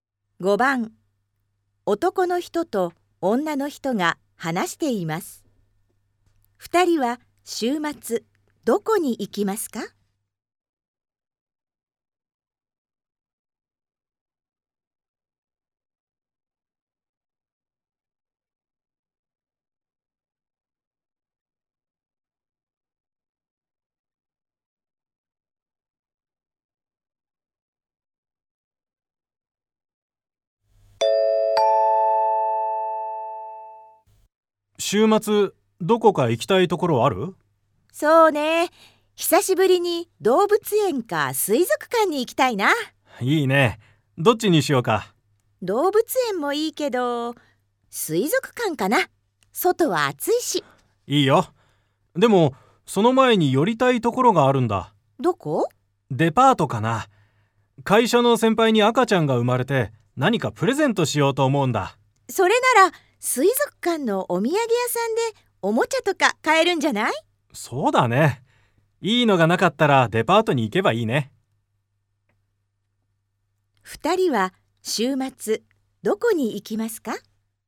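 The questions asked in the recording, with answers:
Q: 2人は週末どこに行きますか?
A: 水族館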